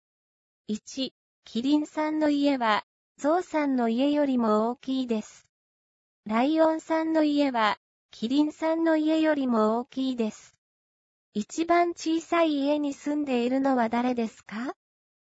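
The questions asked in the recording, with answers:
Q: 一番小さい家に住んでいるのは誰ですか?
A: ゾウさん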